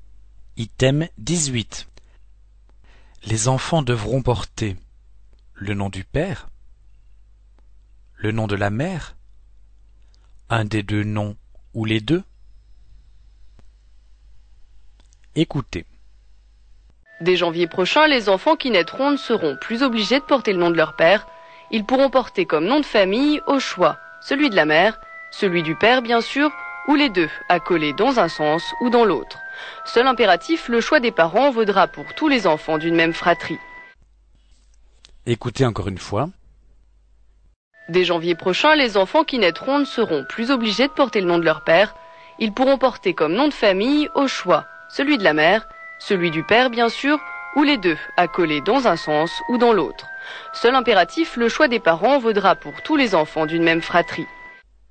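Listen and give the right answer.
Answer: un des deux noms ou les deux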